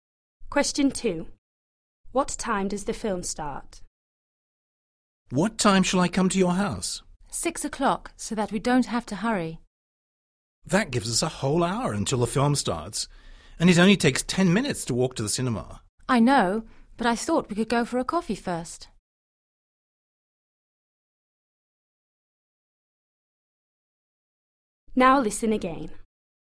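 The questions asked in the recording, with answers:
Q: What time does the film start?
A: 7 o'clock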